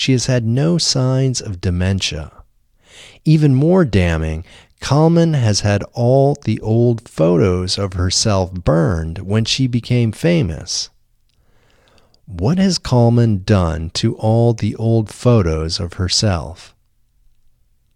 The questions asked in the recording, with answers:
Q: What has Kalman done to all the old photos of herself?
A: Kalman has had all the old photos of herself burned when she became famous.